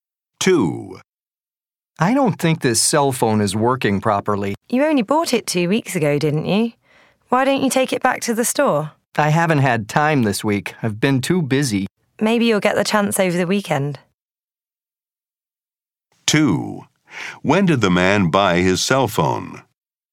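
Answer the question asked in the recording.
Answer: Two weeks ago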